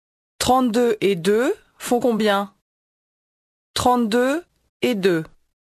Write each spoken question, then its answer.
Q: 32 et 2 font combien?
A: 34.